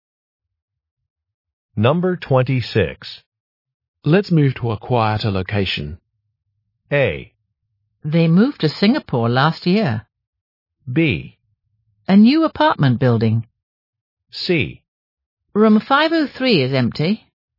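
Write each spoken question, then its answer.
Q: Let's move to a quieter location.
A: C: Room 503 is empty.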